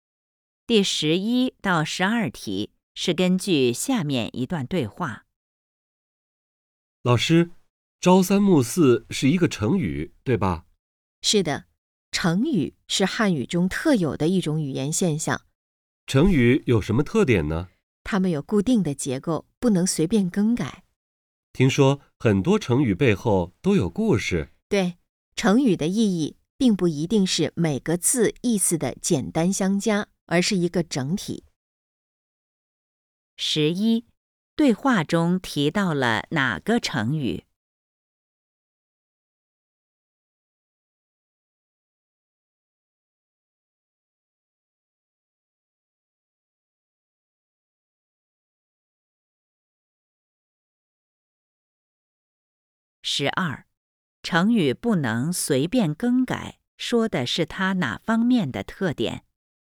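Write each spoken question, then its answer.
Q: 对话中提到了哪个成语?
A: 朝三暮四

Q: 成语不能随便更改,说的是它哪方面的特点?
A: 结构固定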